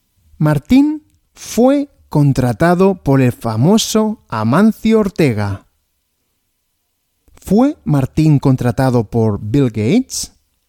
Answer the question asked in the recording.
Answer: No, Martín no fue contratado por Bill Gates, sino por Amancio Ortega.